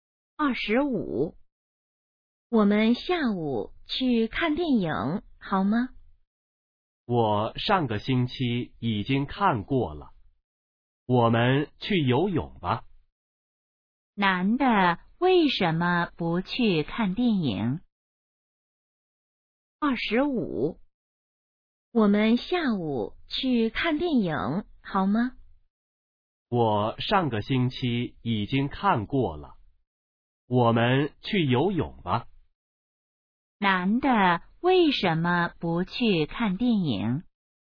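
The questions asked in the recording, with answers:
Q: 男的为什么不去看电影?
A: 上个星期已经看过了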